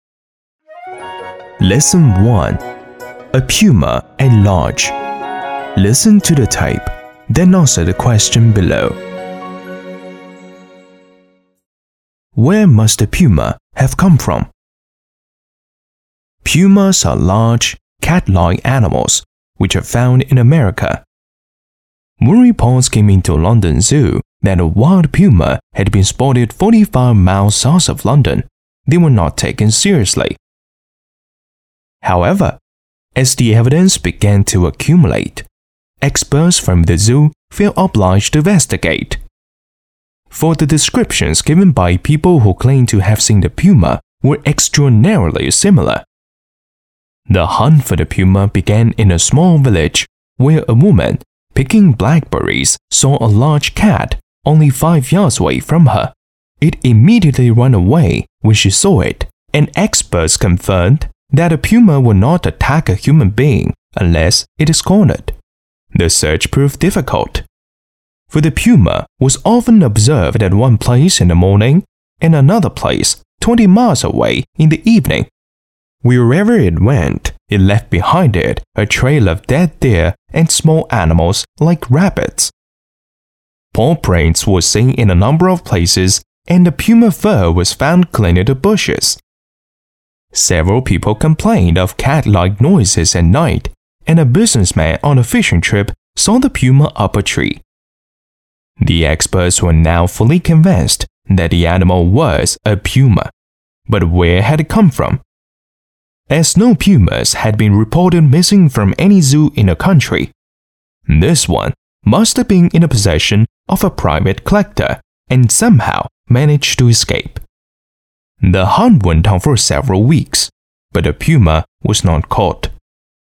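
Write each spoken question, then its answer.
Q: Where must the puma have come from?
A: From a private collector, from whom it somehow escaped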